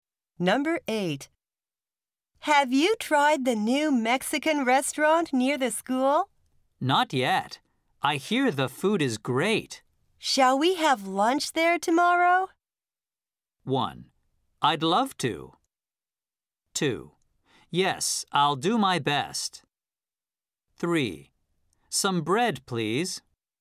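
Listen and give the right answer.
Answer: 1: I'd love to.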